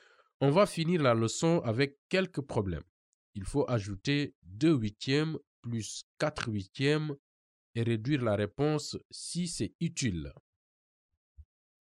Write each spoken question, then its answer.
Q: Il faut ajouter 2 huitièmes plus 4 huitièmes et réduire la réponse si c'est utile.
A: Donc, ma réponse, c'est 3 quarts.